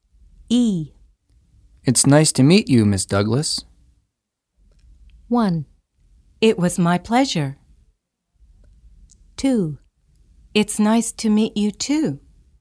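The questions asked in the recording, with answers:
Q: It's nice to meet you, Ms. Douglas.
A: 2: It's nice to meet you, too.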